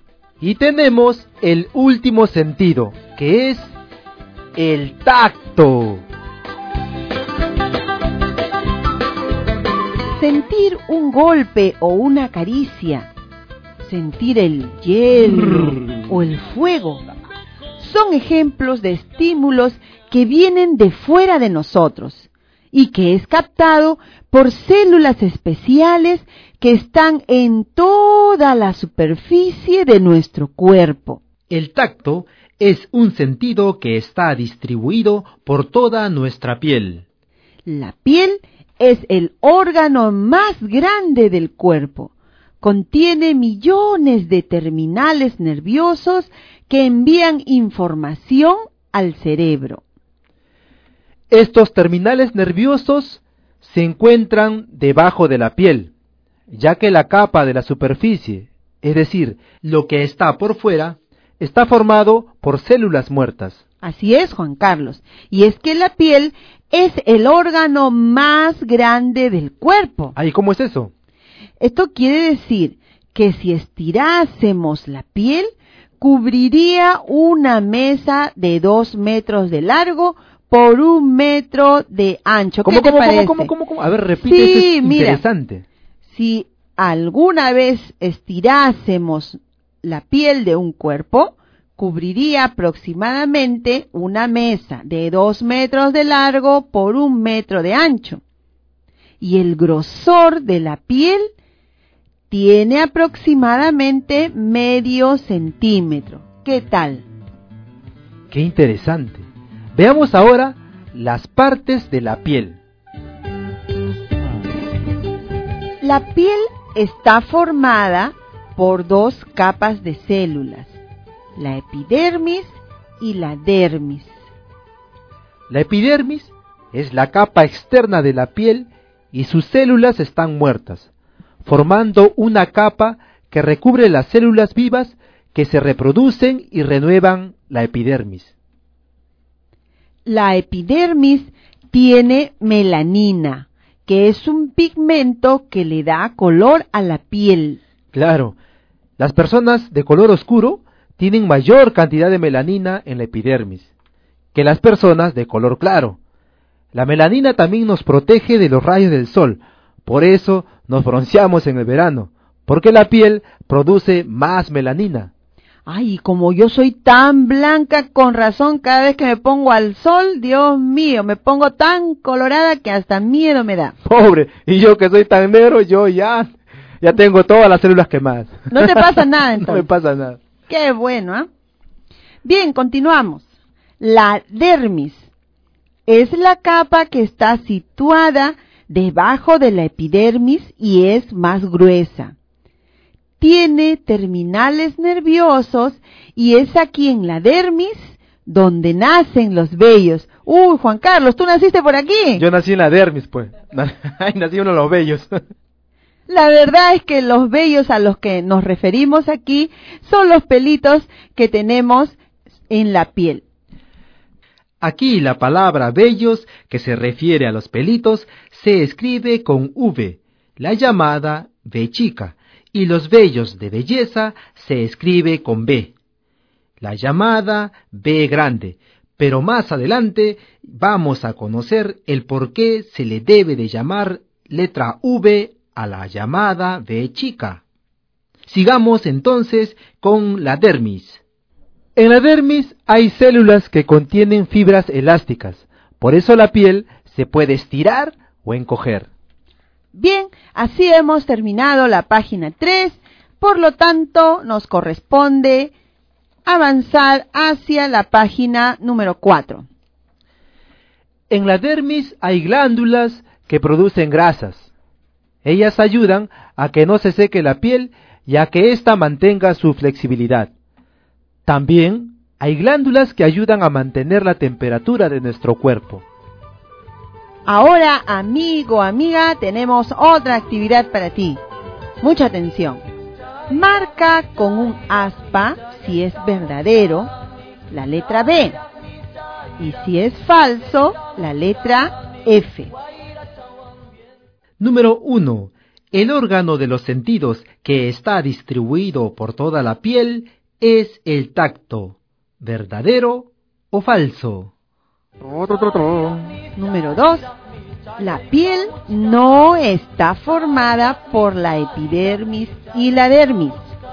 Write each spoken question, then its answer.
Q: El órgano de los sentidos que está distribuido por toda la piel es el tacto. ¿Verdadero o falso?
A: Yo he marcado verdadero.